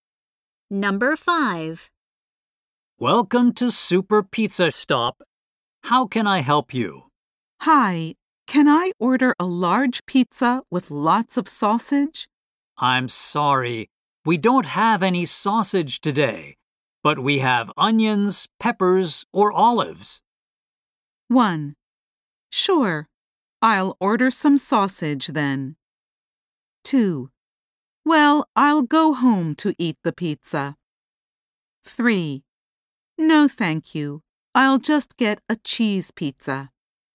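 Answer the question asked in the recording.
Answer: 3: No, thank you. I'll just get a cheese pizza.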